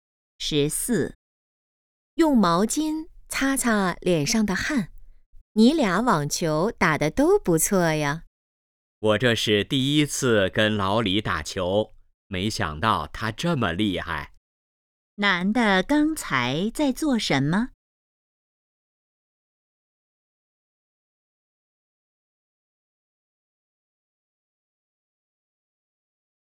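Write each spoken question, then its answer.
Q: 男的刚才在做什么?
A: 打网球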